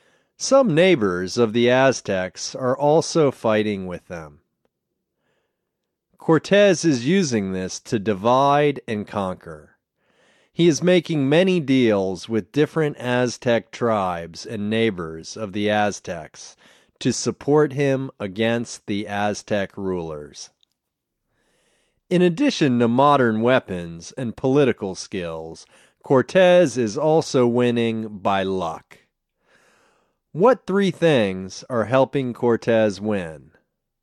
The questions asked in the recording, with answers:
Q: What three things are helping Cortez win?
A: Modern weapons, political skills, and luck are helping Cortez win.